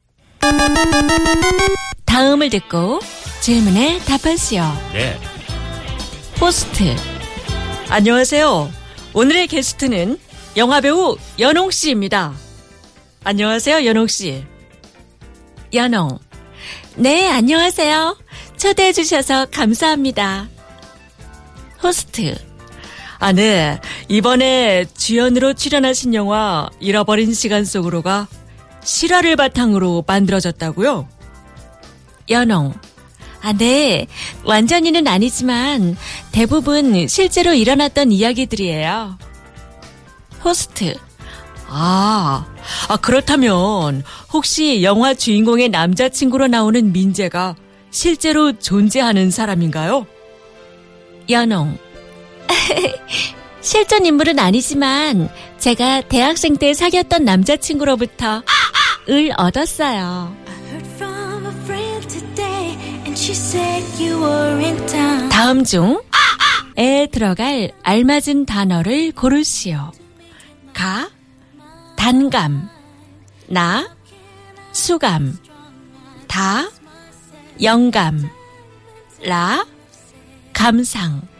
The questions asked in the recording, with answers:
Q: 다음 중 에 들어갈 알맞은 단어를 고르시오. 가, 단감, 나, 수감, 다, 영감, 라, 감상.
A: Ta. So, 대학생 때 사귀었던 남자친구로부터 영감을 얻었어요.